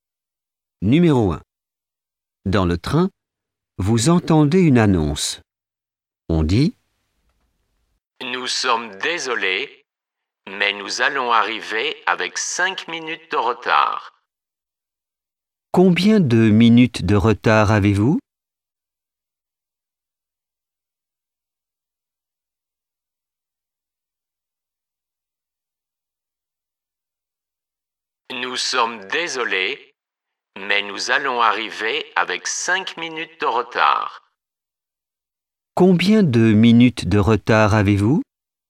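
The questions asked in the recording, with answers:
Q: Combien de minutes de retard avez-vous ?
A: 5 minutes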